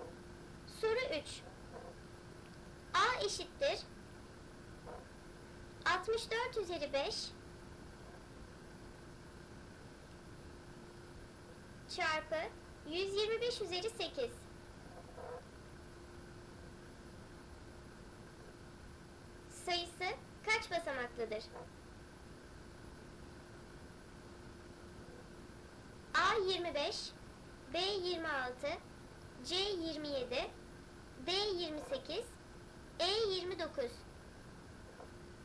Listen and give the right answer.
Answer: Doğru cevap B 26.